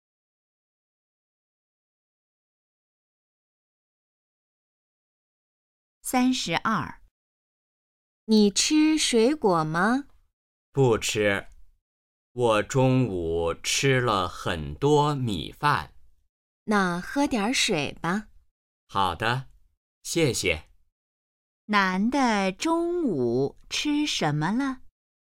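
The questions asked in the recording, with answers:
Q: 男的中午吃什么了?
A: 米饭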